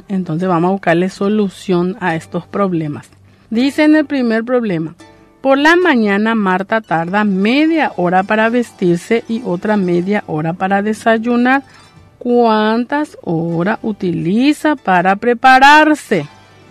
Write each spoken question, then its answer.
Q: ¿Cuántas horas utiliza para prepararse?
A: Utiliza una hora.